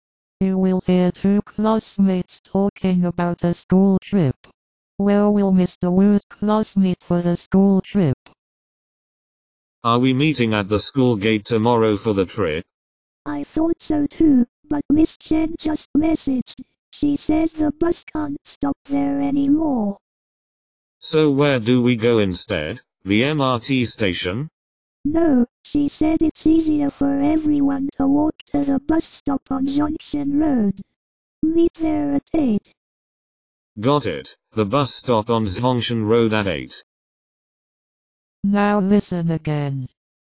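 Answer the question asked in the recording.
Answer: At the bus stop on Junction Road

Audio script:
You will hear two classmates talking about a school trip. Where will Mr Wu's class meet for the school trip?
ManAre we meeting at the school gate tomorrow for the trip?
WomanI thought so too, but Miss Chen just messaged — she says the bus can't stop there anymore.
ManSo where do we go instead? The MRT station?
WomanNo, she said it's easier for everyone to walk to the bus stop on Zhongshan Road. Meet there at eight.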